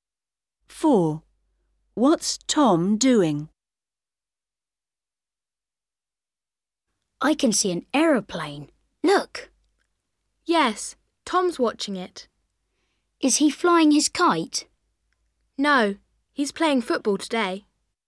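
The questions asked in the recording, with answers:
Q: What's Tom doing?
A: playing football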